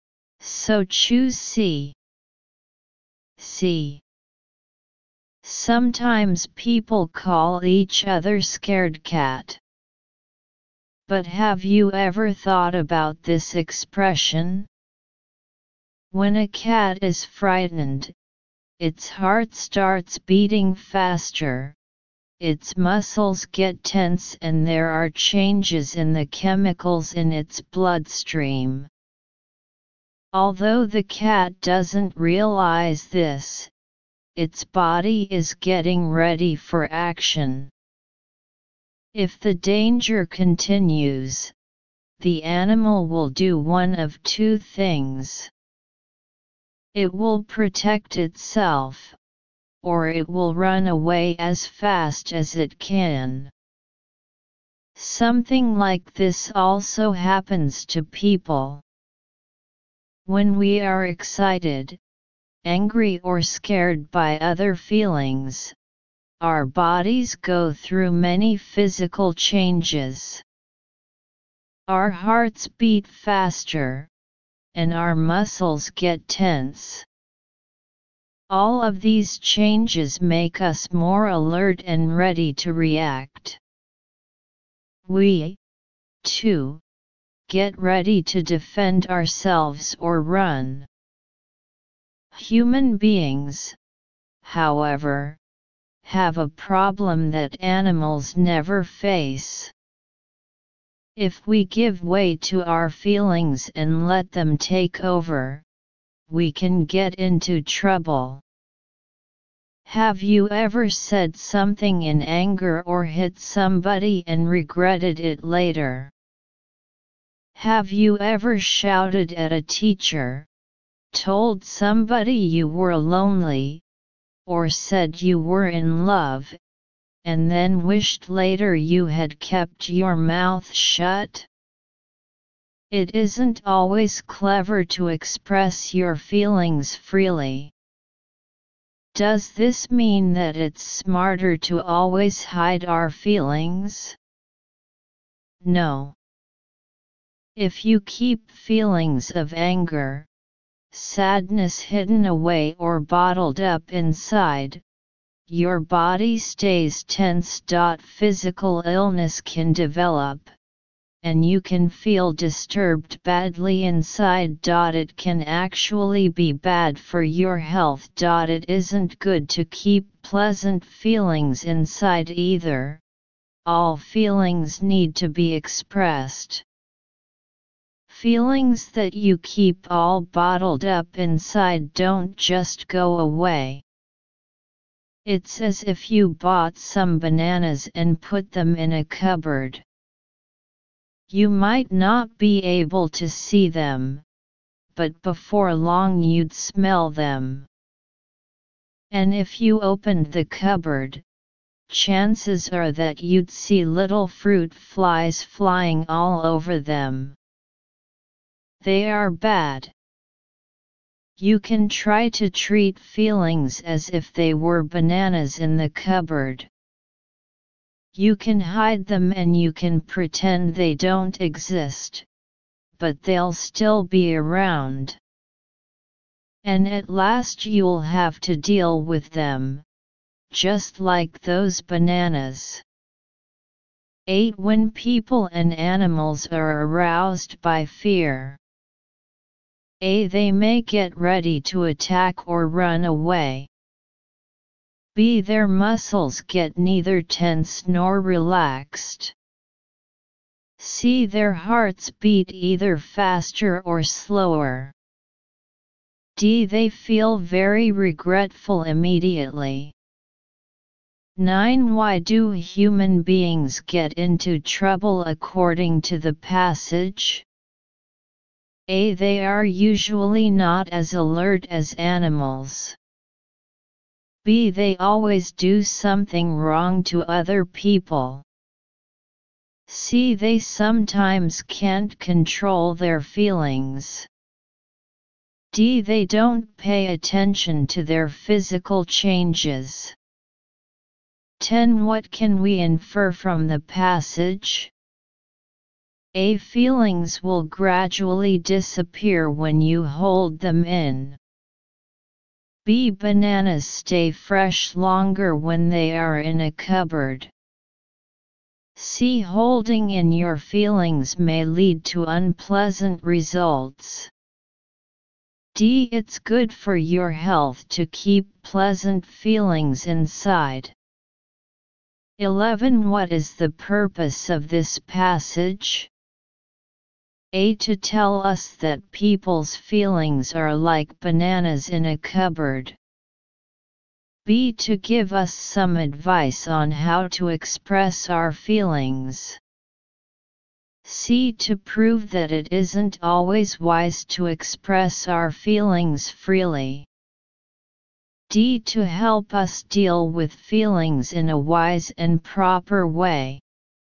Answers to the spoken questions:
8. 8. A.
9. 9. C.
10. 10. C.
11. 11. D.